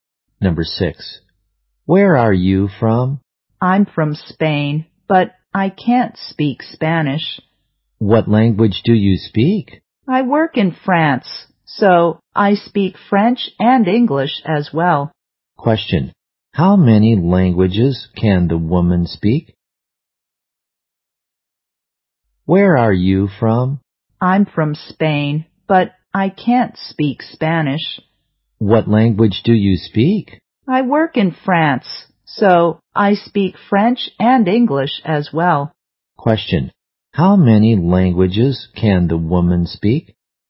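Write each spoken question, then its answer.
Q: how many languages can the woman speak?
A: Two (French and English)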